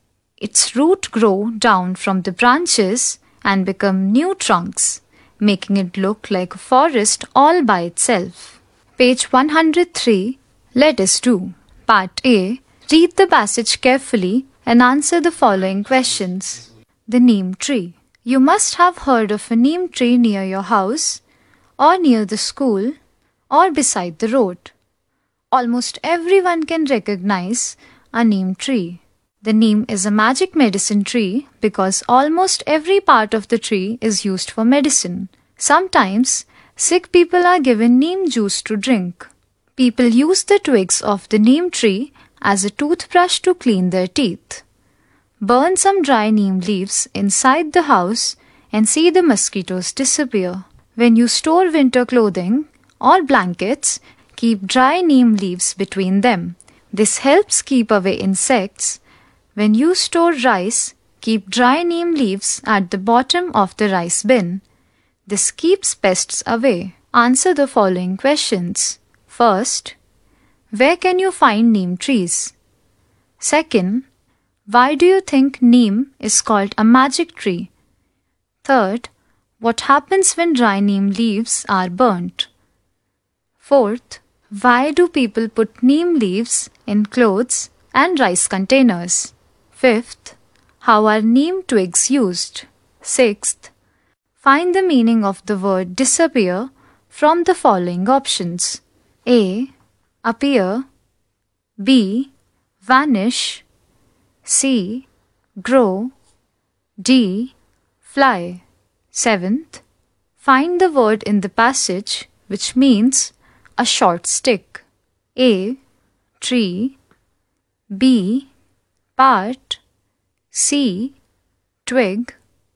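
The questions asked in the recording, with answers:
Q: where can you find neem trees?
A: Near houses, schools or beside the road

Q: why do you think neem is called a magic tree?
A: Because almost every part of it is used for medicine

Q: what happens when dry neem leaves are burnt?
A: Mosquitoes disappear

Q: why do people put neem leaves in clothes and rice containers?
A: To keep away insects and pests

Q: how are neem twigs used?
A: As a toothbrush to clean teeth

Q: find the meaning of the word disappear from the following options.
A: B: Vanish.

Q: find the word in the passage which means a short stick.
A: C: Twig.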